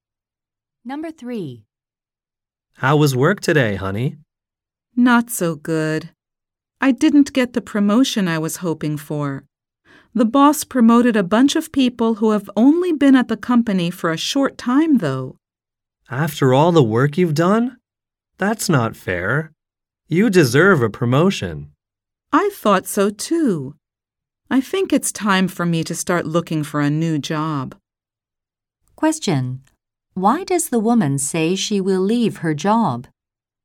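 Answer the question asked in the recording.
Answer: She didn't get the promotion she hoped for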